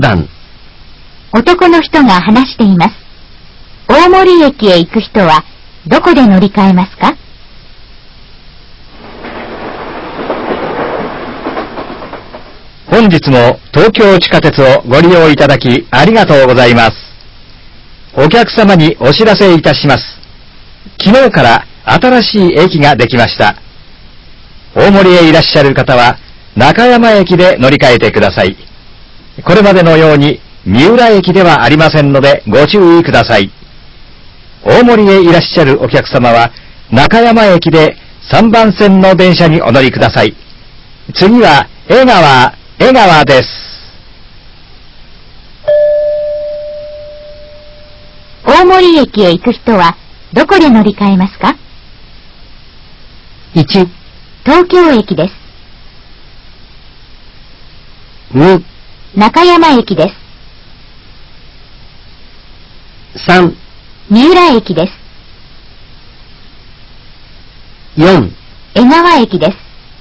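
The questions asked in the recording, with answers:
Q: 大森駅へ行く人はどこで乗り換えますか?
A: 2: 中山駅です。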